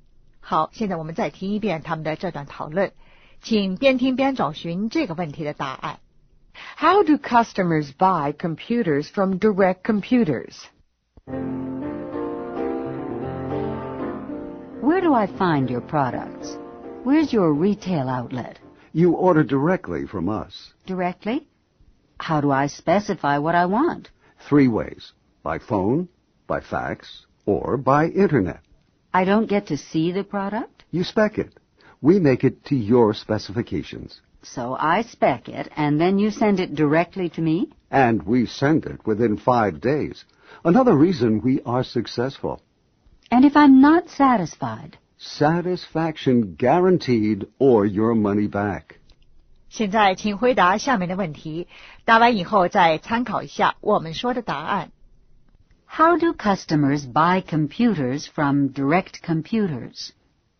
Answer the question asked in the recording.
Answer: By phone, by fax, or by internet.